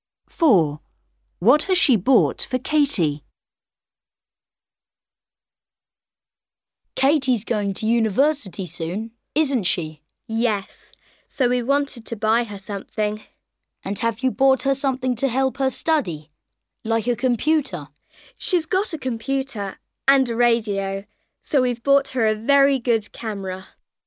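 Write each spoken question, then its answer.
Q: What has she bought for Katie?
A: a camera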